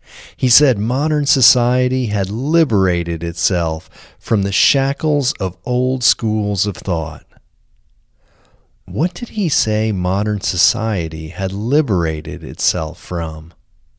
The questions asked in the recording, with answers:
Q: What did he say modern society had liberated itself from?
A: He said modern society had liberated itself from the shackles of old schools of thought.